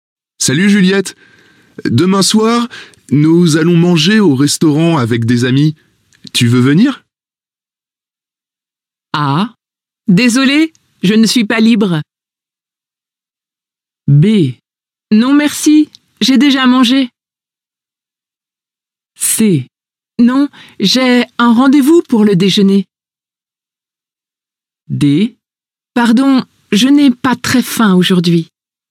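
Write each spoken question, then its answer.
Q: Tu veux venir?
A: A: Désolée, je ne suis pas libre.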